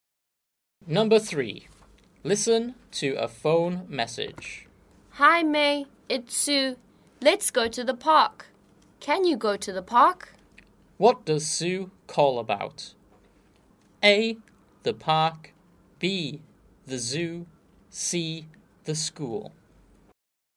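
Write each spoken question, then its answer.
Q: What does Sue call about?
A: A: The park.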